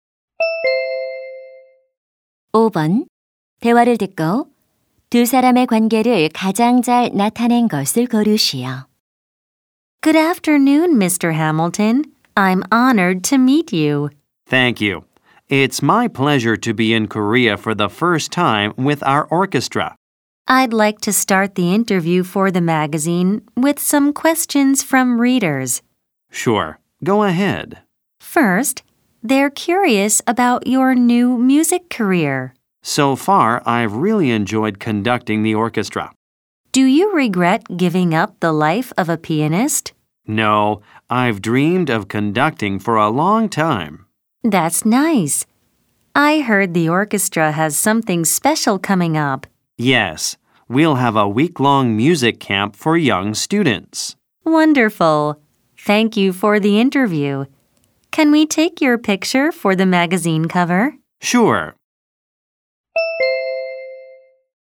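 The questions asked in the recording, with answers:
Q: 대화를 듣고 두 사람의 관계를 가장 잘 나타낸 것을 고르시오.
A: 잡지 기자 - 오케스트라 지휘자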